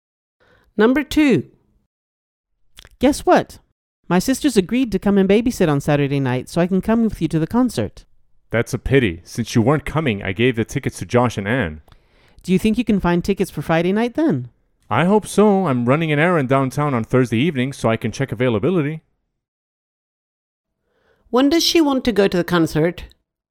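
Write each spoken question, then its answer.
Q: When does she want to go to the concert?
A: Friday night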